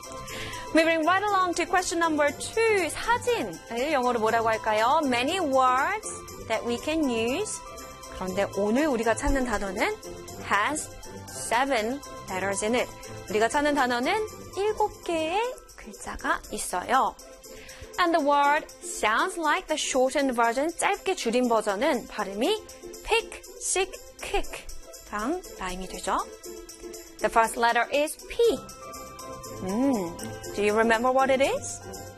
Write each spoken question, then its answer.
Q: 사진, 영어로 뭐라고 할까요?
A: 사진 in English can be picture, P-I-C-T-U-R-E.